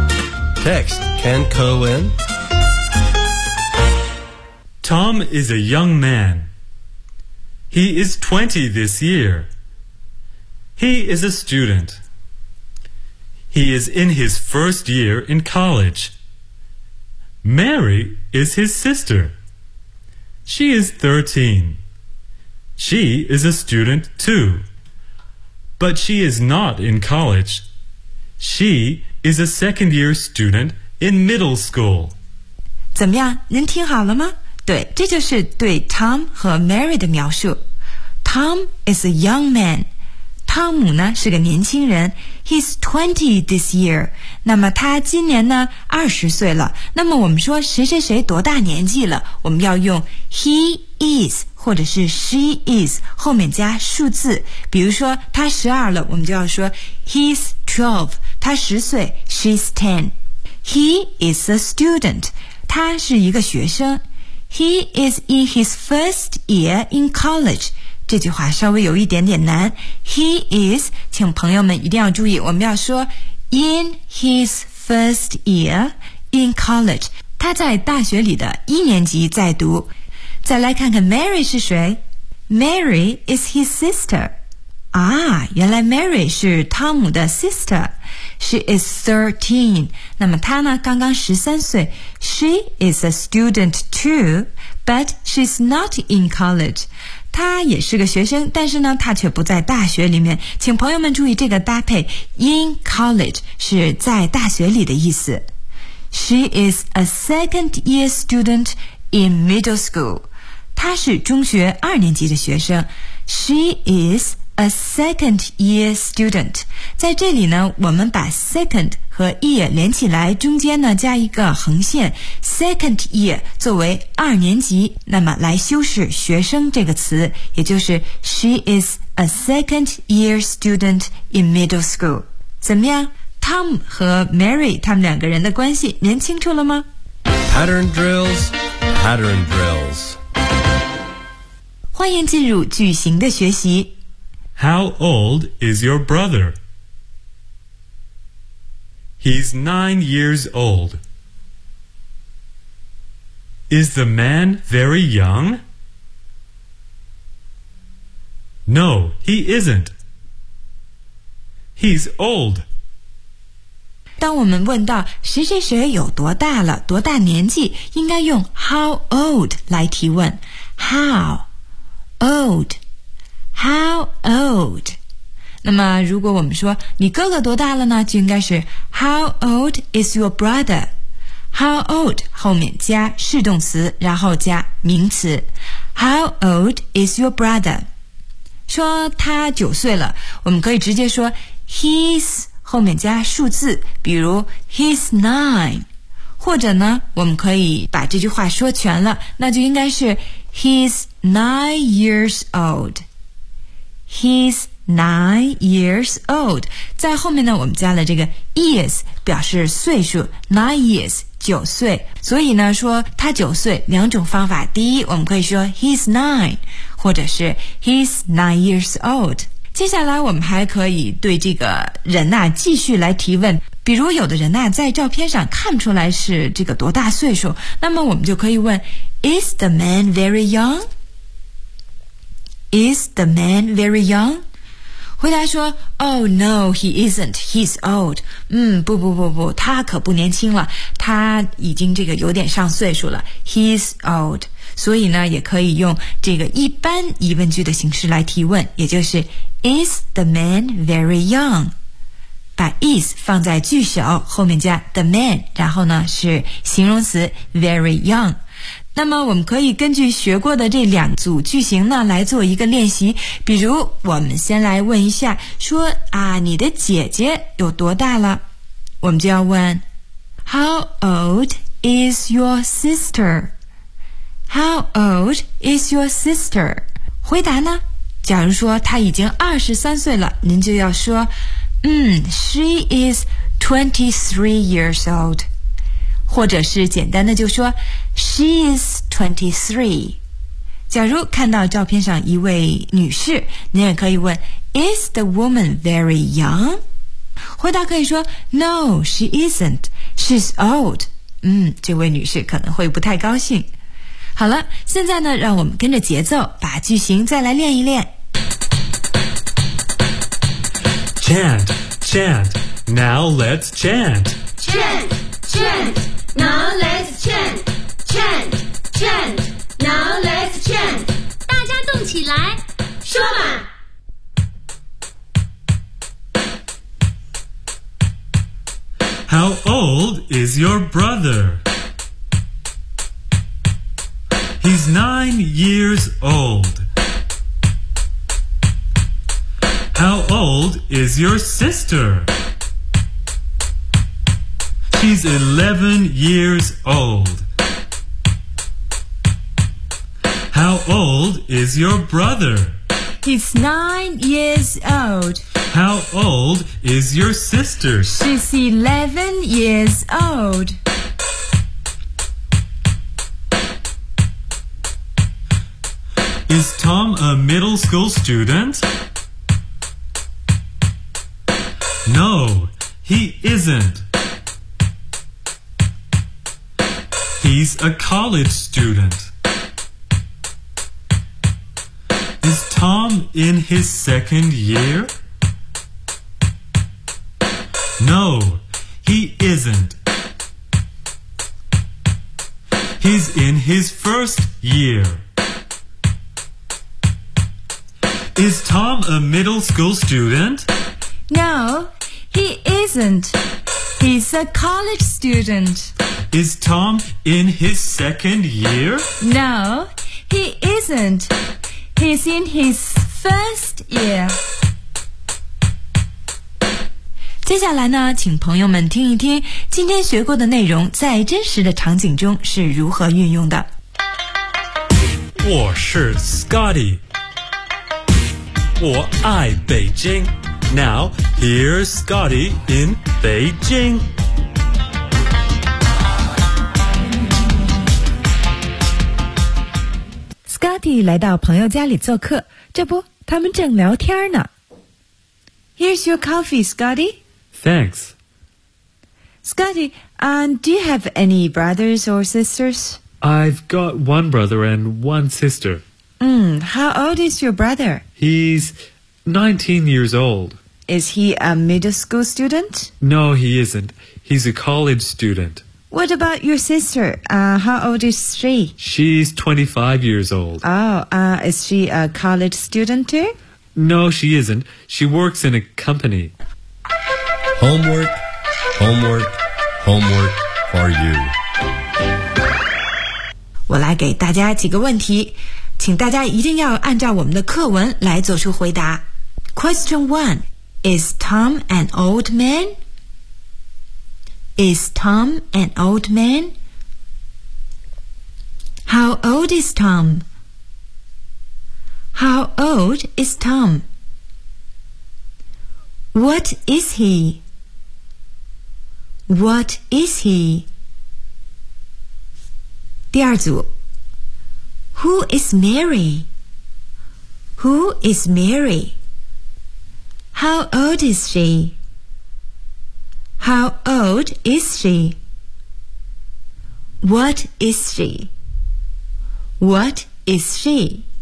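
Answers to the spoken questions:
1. No, he isn't. He is a young man.
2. He is 20.
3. He is a student, in his first year in college.
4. She is Tom's sister.
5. She is 13.
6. She is a second year student in middle school.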